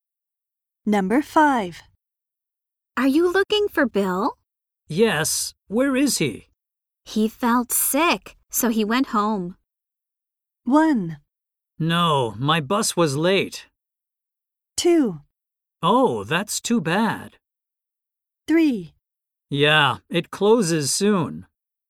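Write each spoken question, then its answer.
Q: He felt sick, so he went home.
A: 2: Oh, that's too bad.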